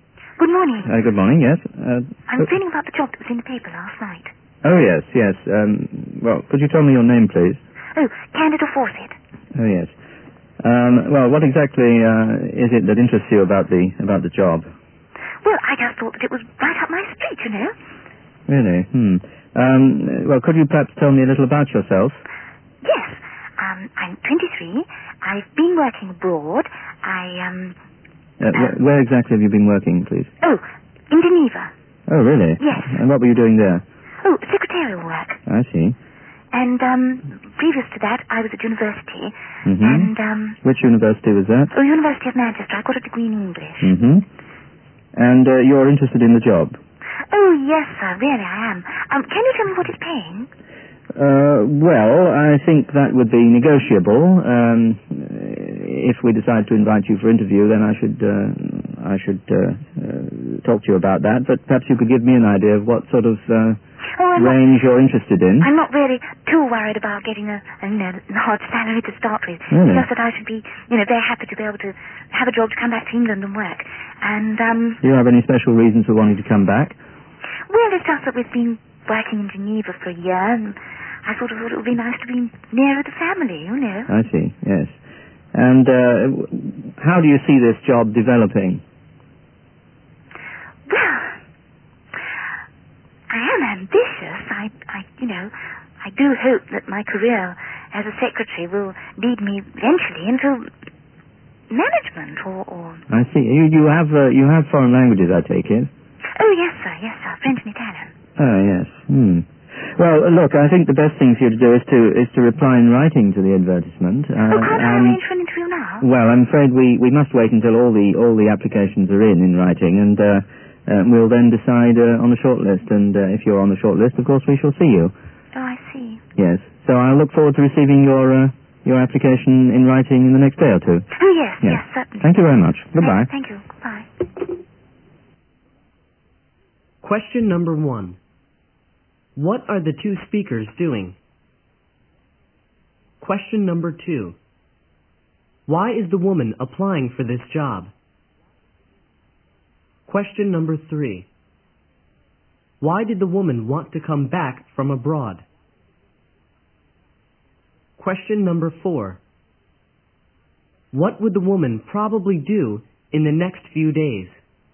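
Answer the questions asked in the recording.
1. The woman is calling to ask about a job advertised in the paper
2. She thinks the job is right up her street (it suits her)
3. To be nearer her family
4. Send a written application for the job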